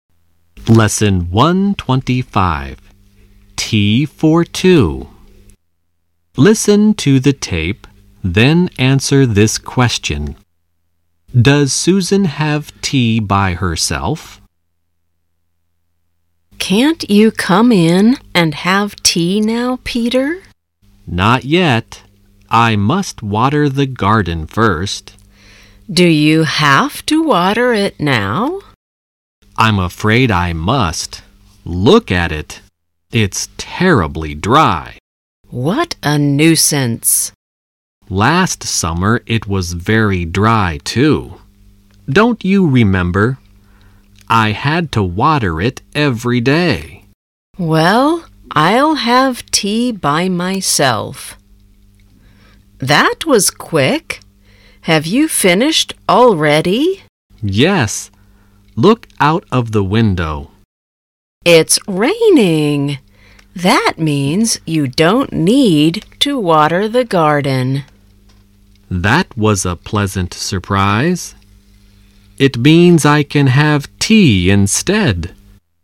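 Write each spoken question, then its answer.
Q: Does Susan have tea by herself?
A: No, it started raining, so Peter didn't need to water the garden and had tea with her.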